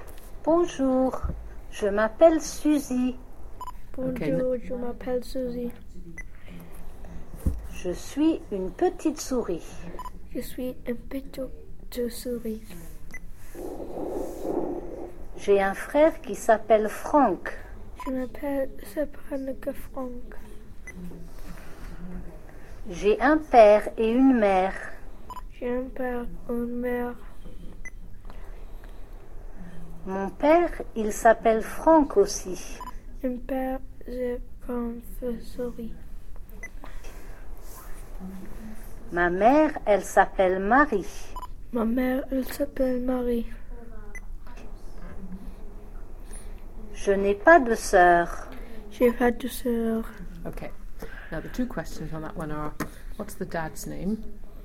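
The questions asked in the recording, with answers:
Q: what's the dad's name?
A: Franck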